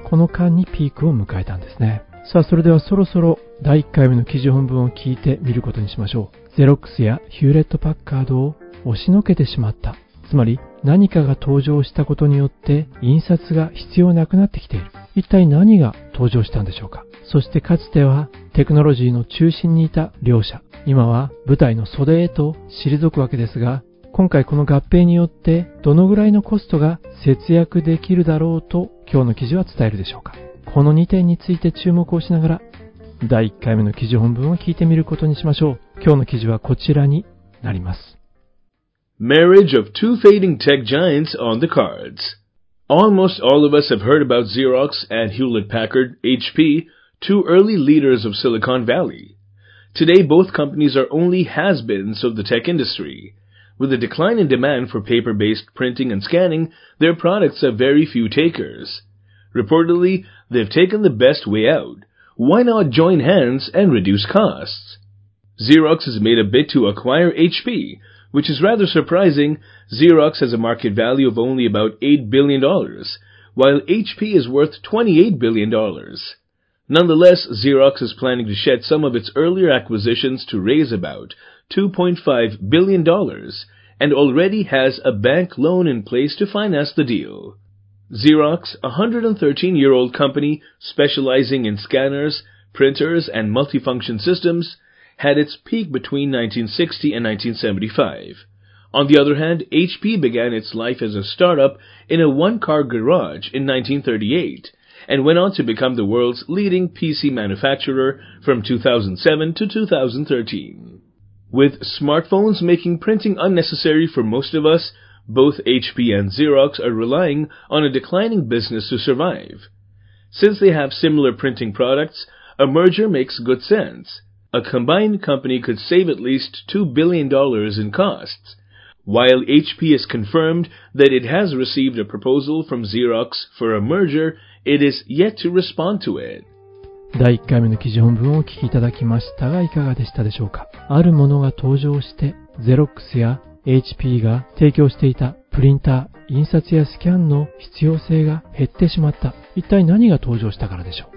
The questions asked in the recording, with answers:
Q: 一体何が登場したんでしょうか。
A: わかりましたでしょうか?スマートフォンでしたね。

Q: 今回この合併によってどのぐらいのコストが節約できるだろうと今日の記事は伝えるでしょうか。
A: 経費として少なくとも2 billion、20億ドルは節約できる可能性がありますということですね。